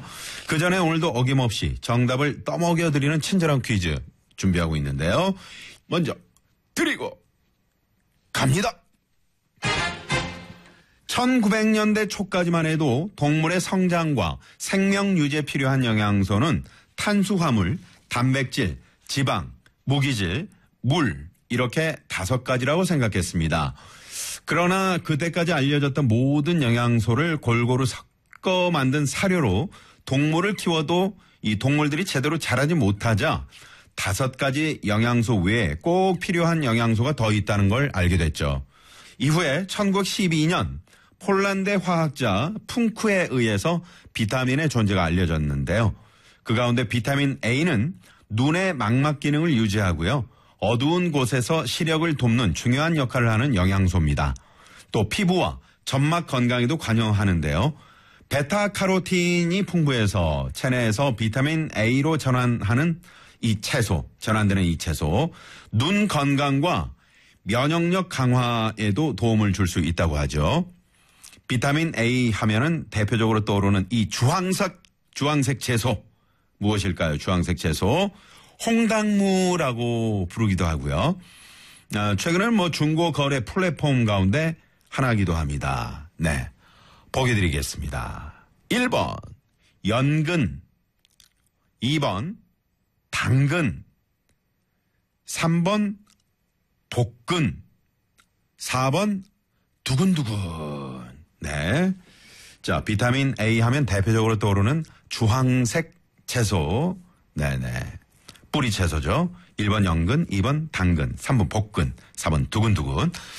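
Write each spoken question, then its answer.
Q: 비타민 A 하면은 대표적으로 떠오르는 이 주황색 채소 무엇일까요?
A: 2번: 당근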